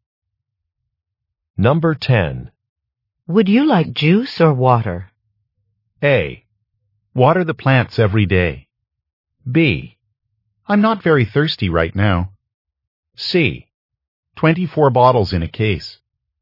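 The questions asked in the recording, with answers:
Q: Would you like juice or water?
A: B: I'm not very thirsty right now.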